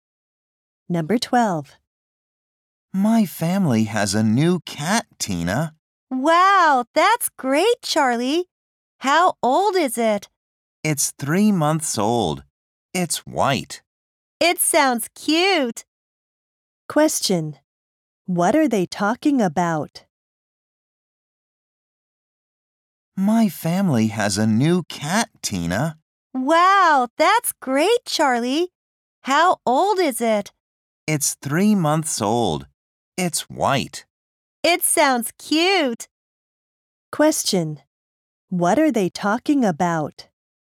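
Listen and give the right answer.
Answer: Charlie's family's new cat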